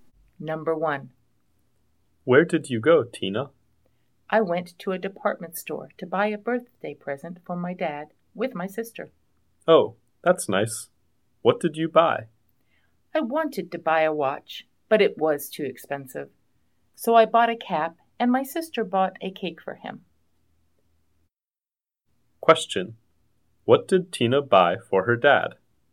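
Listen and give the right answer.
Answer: A cap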